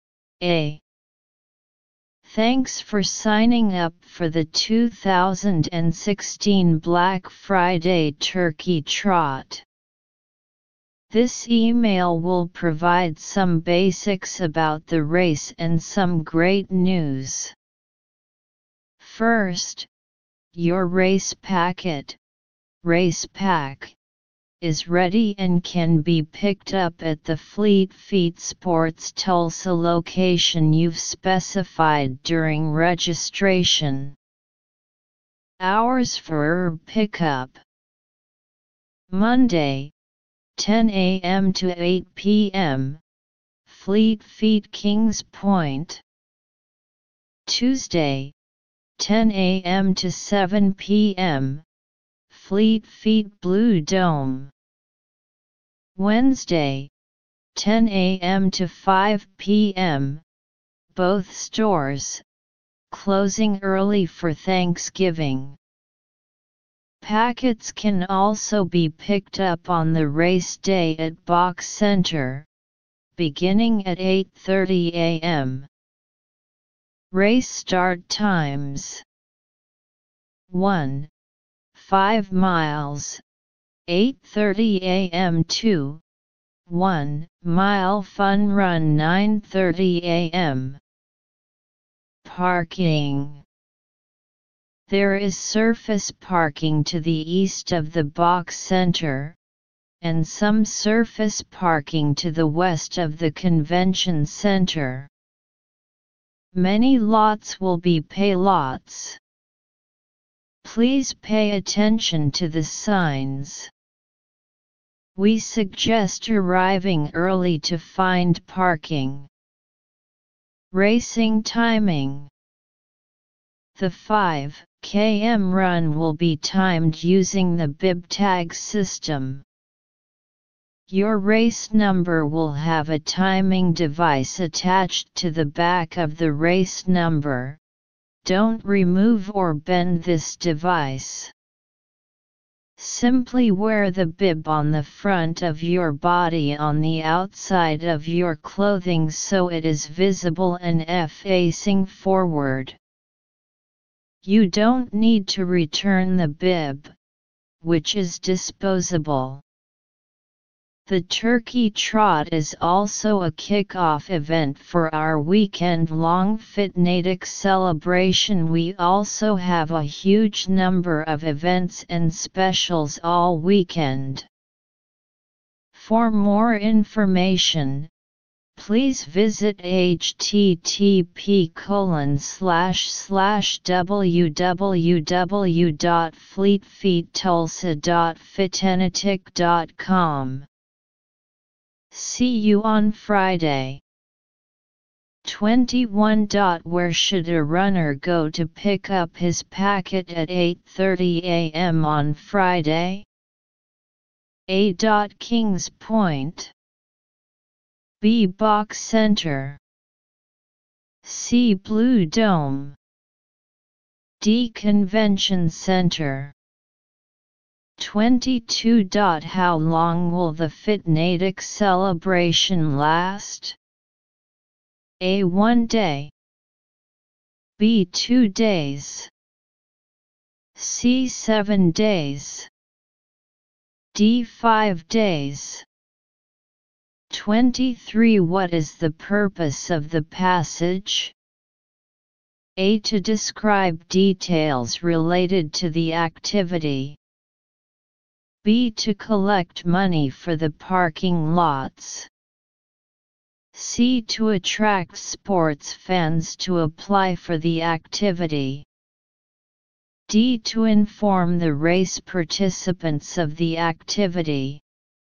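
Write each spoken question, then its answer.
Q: Where should a runner go to pick up his packet at 8:30 a.m. on Friday?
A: B: Box Center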